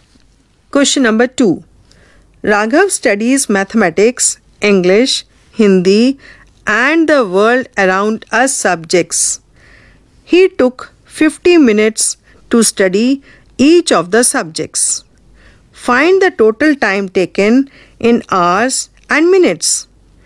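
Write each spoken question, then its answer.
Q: Find the total time taken in hours and minutes.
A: 3 hours 20 minutes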